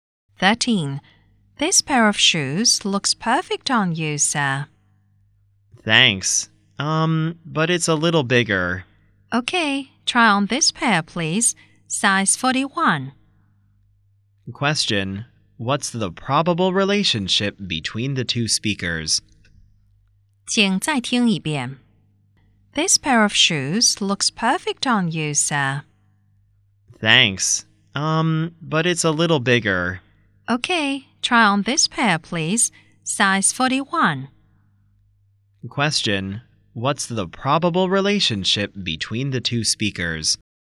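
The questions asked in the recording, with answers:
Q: What's the probable relationship between the two speakers?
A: Shop assistant and customer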